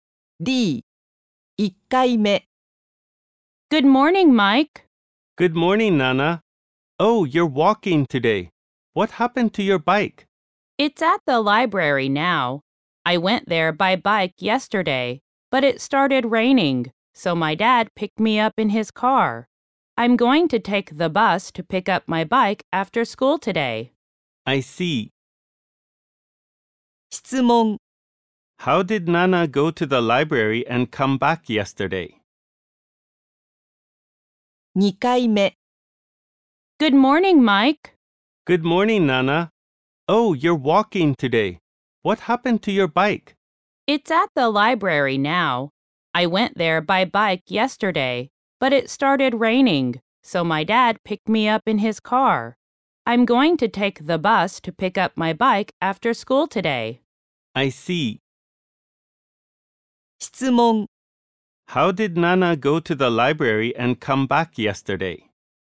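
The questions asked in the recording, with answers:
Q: How did Nana go to the library and come back yesterday?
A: She went by bike and came back in her dad's car.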